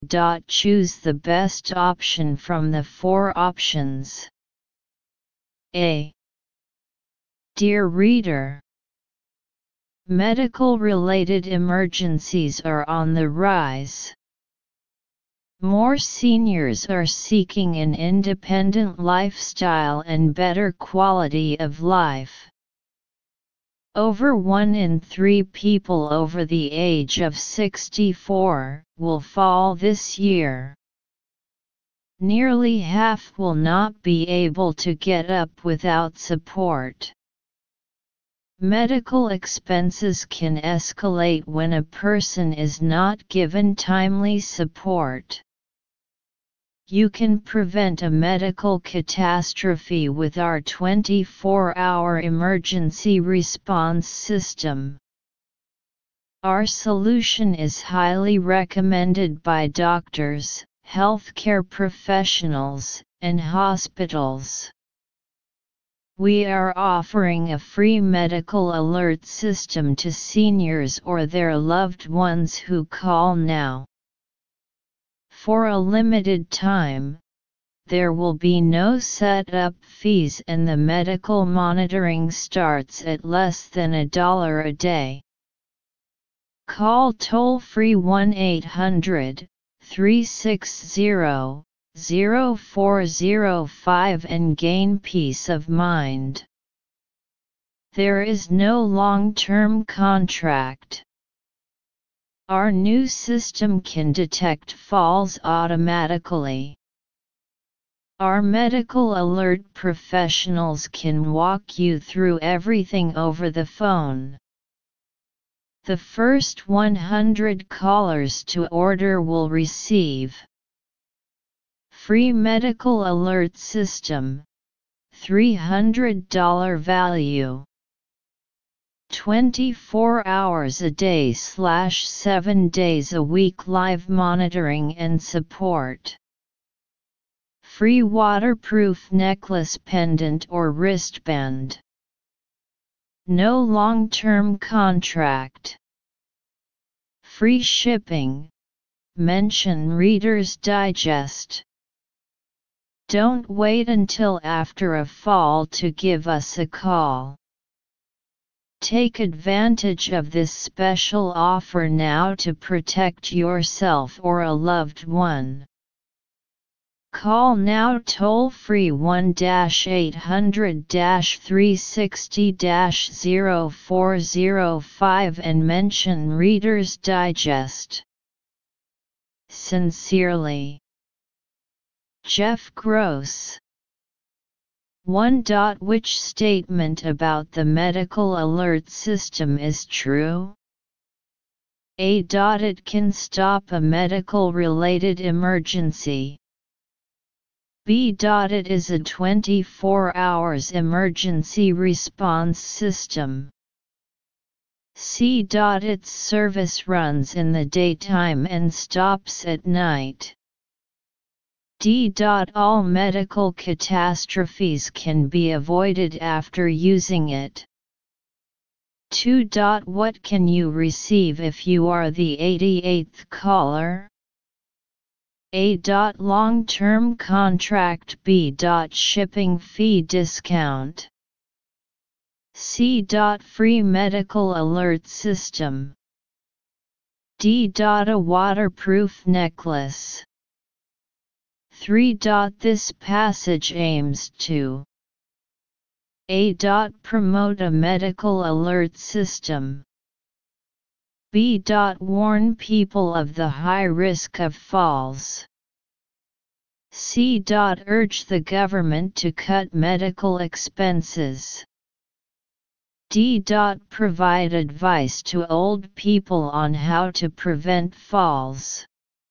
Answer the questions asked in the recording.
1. 1. B.
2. 2. C.
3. 3. A.